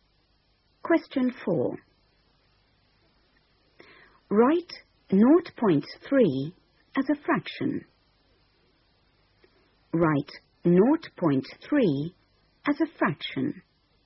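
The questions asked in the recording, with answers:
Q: Write 0.3 as a fraction.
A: 3/10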